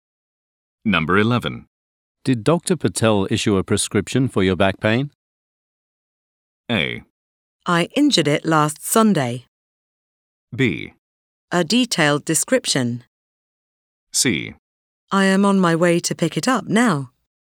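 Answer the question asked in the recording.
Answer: C: I am on my way to pick it up now.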